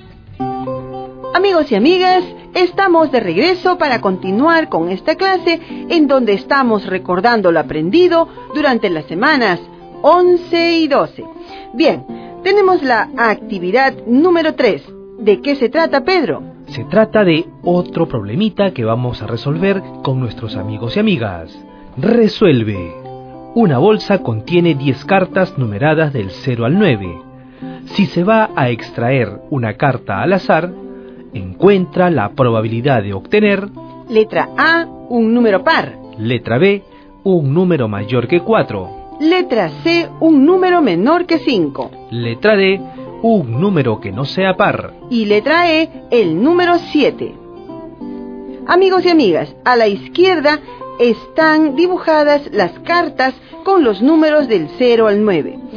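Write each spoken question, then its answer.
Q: Letra B, un número mayor que 4.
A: 5/10 = 50%

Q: Letra C, un número menor que 5.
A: 5/10 = 50%

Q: Letra D, un número que no sea par.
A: 5/10 = 50%

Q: Y letra E, el número 7.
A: 1/10 = 10%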